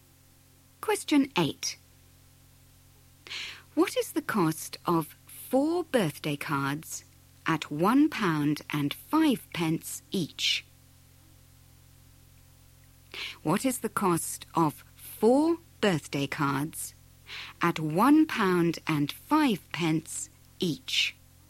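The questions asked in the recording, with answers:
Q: What is the cost of 4 birthday cards at £1.05 each?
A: £4.20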